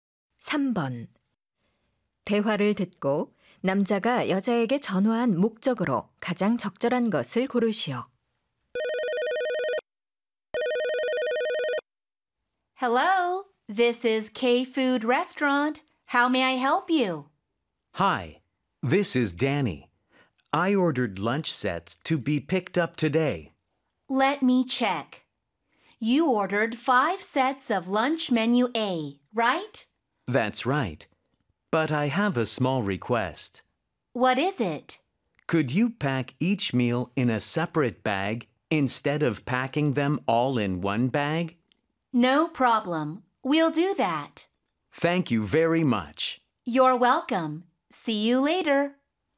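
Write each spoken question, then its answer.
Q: 대화를 듣고 남자가 여자에게 전화한 목적으로 가장 적절한 것을 고르시오.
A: 주문한 점심 세트를 각각 따로 포장해 달라고 요청하려고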